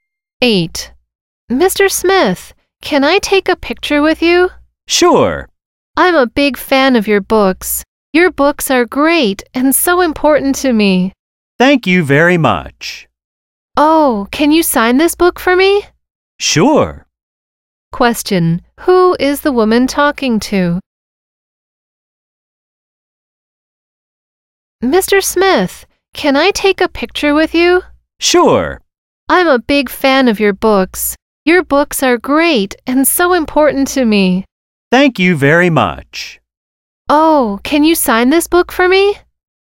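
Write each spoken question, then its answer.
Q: Who is the woman talking to?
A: Mr. Smith, a writer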